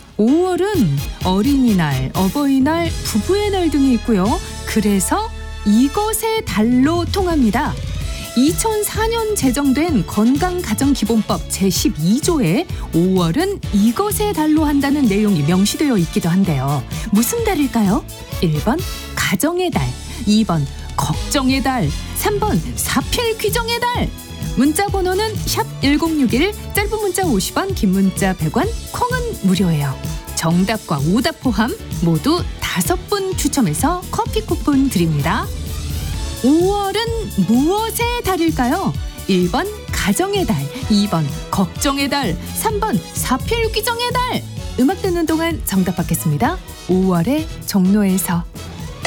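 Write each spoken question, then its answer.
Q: 5월은 무엇의 달일까요?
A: 1: 가정의 달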